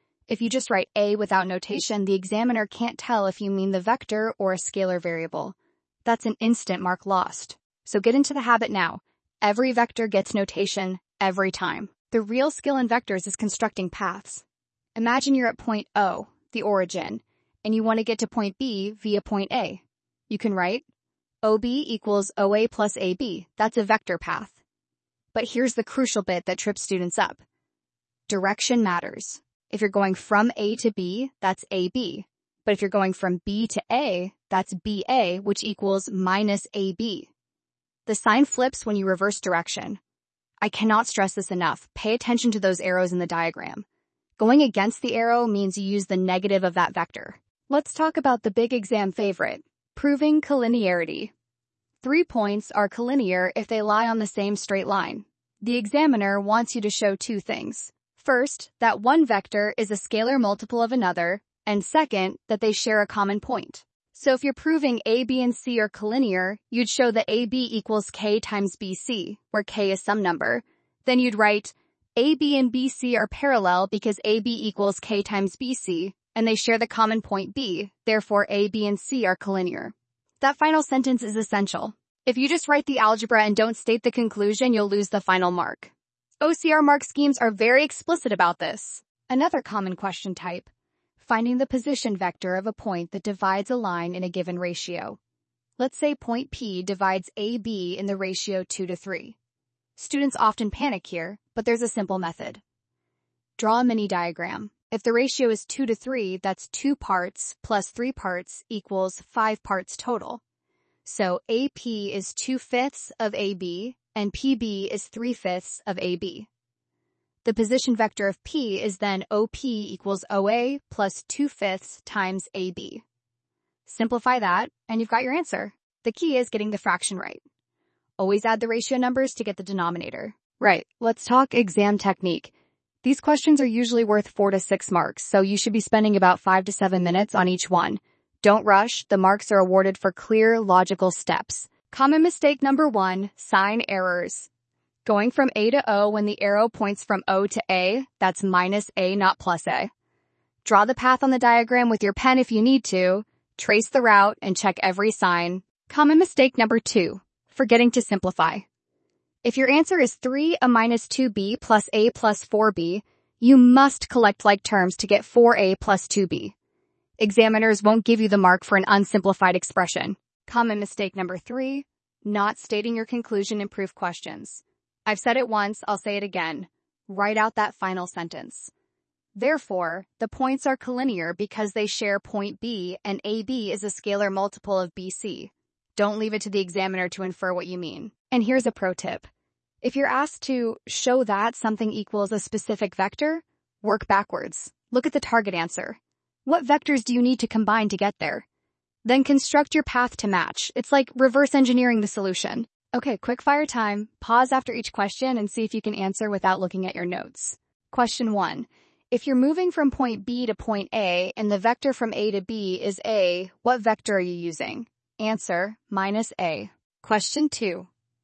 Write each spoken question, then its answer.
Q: If you're moving from point B to point A and the vector from A to B is A, what vector are you using?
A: Answer, minus A.